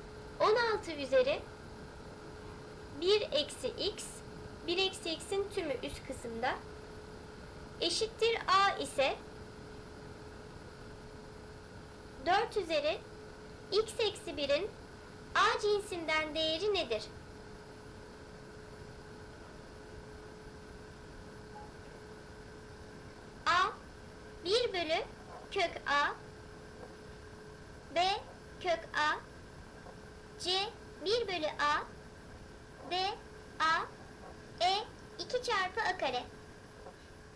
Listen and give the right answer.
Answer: Doğru cevap A seçeneği 1 bölü kök A.